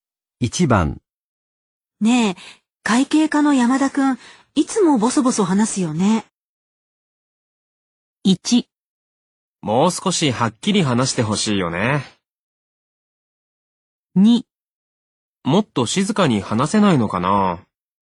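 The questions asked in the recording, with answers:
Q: ねえ、会計課の山田くん、いつもボソボソ話すよね。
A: 1: もう少しはっきり話してほしいよね。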